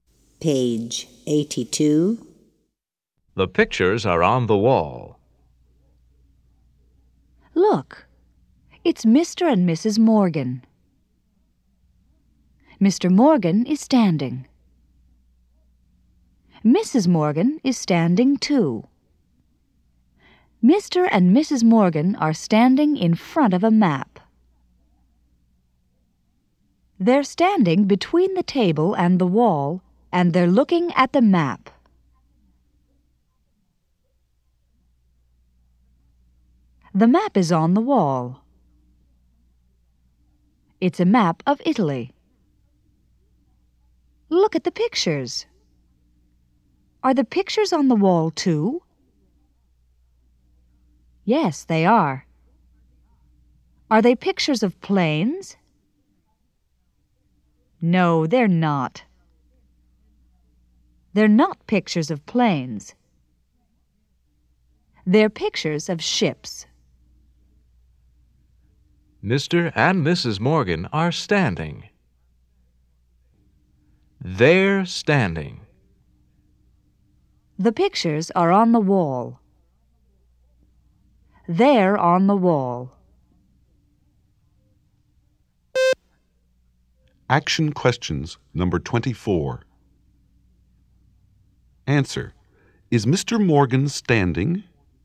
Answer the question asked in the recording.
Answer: Yes, he is.